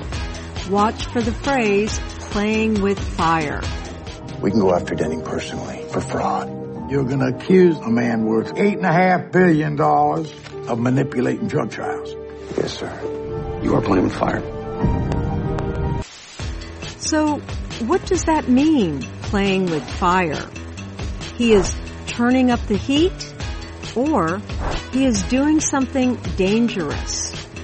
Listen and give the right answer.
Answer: Playing with fire means you are doing something dangerous.